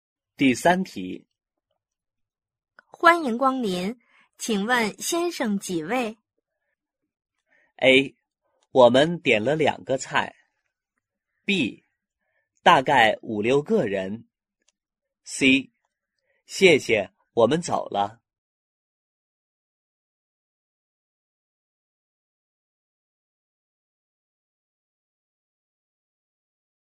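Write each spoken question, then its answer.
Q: 欢迎光临,请问先生几位?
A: B: 大概5-6个人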